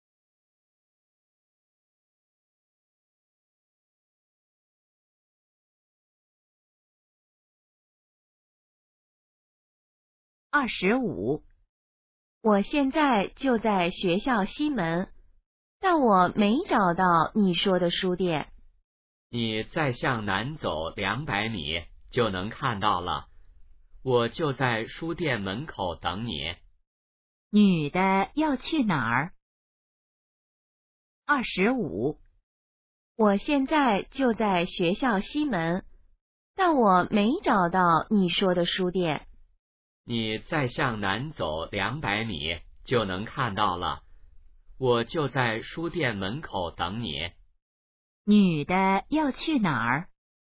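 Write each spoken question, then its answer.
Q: 女的要去哪儿?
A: 书店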